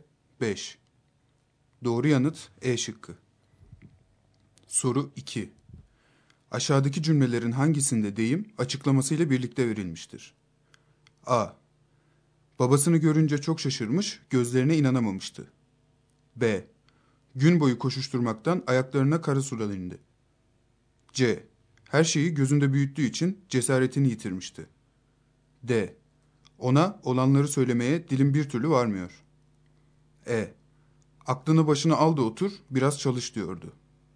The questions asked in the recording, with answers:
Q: Aşağıdaki cümlelerin hangisinde deyim açıklamasıyla birlikte verilmiştir?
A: Doğru yanıt A şıkkı.